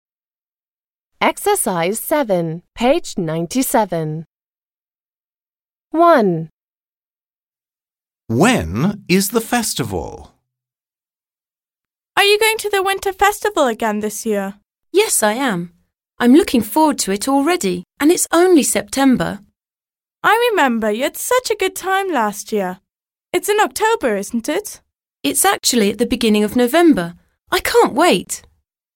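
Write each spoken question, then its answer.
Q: When is the festival?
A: At the beginning of November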